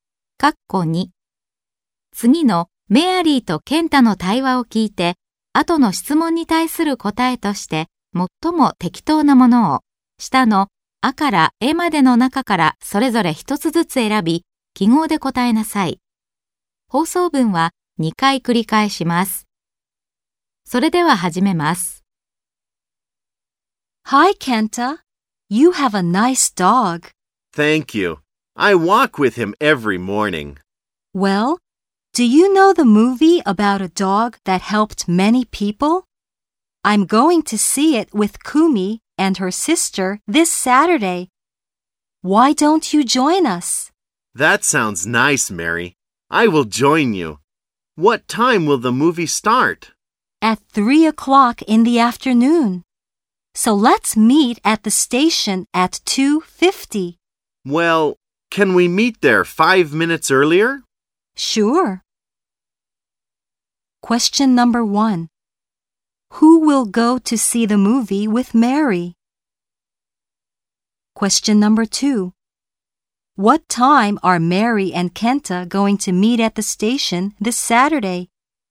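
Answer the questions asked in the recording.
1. Kenta, Kumi and Kumi's sister
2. At 2:45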